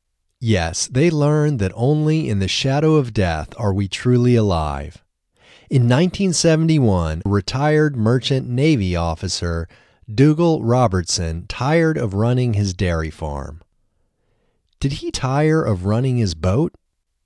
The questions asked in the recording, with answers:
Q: Did he tire of running his boat?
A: No, he didn't tire of running his boat.